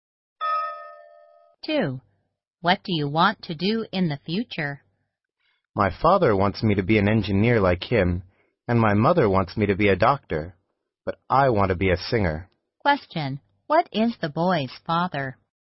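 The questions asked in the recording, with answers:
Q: What is the boy's father?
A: An engineer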